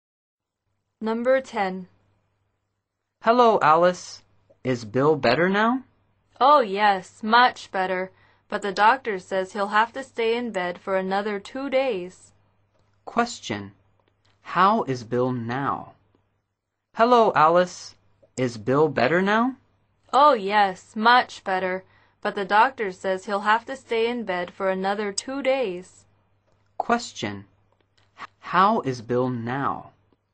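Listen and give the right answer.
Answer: Much better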